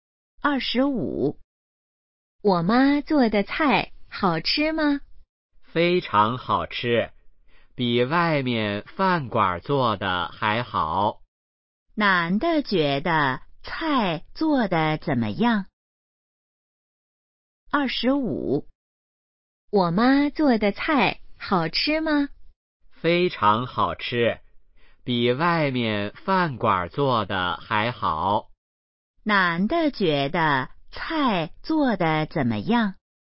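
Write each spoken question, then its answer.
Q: 男的觉得菜做的怎么样?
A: 非常好吃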